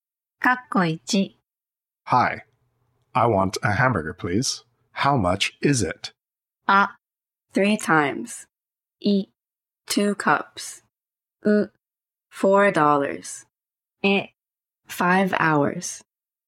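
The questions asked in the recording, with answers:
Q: How much is it?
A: う: $4.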